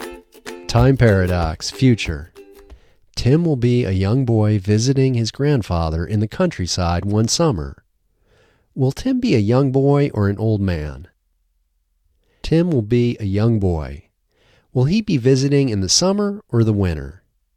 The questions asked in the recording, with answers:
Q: Will Tim be a young boy or an old man?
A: Tim will be a young boy.